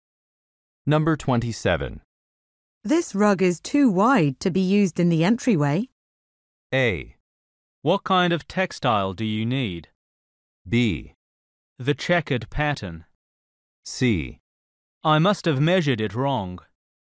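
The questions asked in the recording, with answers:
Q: This rug is too wide to be used in the entryway.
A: C: I must have measured it wrong.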